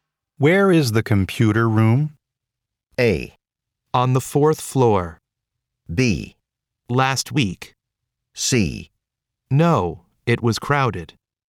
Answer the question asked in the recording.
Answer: コンピュータールームはどこですかという質問の答えとしてふさわしいのは A の4回ですですね。